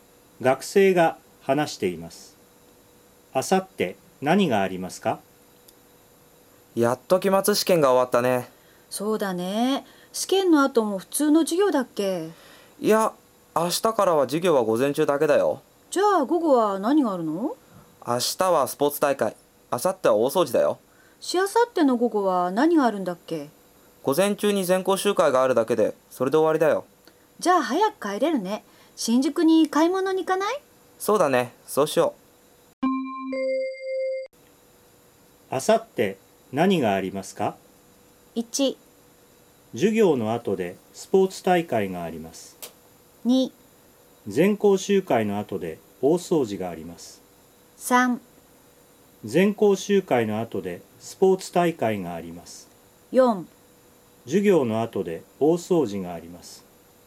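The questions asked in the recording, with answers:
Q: あさって何がありますか?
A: 4: 授業の後で大掃除があります。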